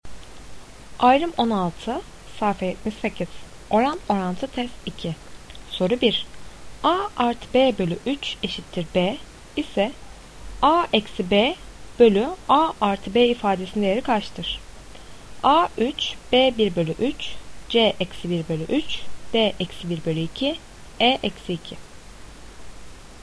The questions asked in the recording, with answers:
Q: A artı B bölü 3 eşittir B ise A eksi B bölü A artı B ifadesinin değeri kaçtır?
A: Doğru cevap B 1 bölü 3.